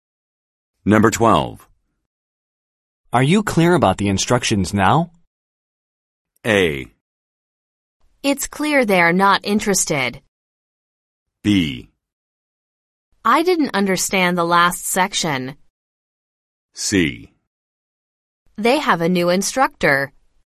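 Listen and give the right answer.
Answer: B: I didn't understand the last section.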